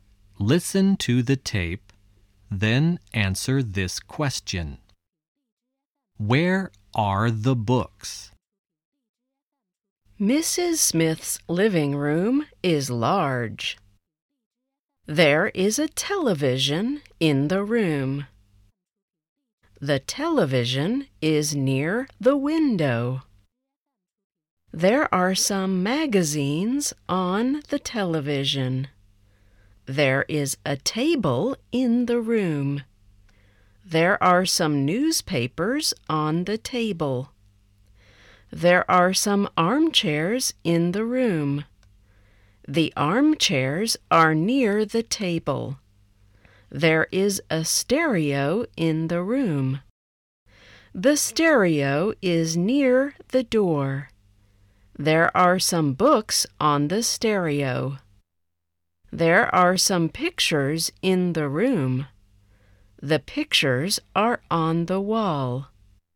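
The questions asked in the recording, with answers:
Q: Where are the books?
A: On the stereo.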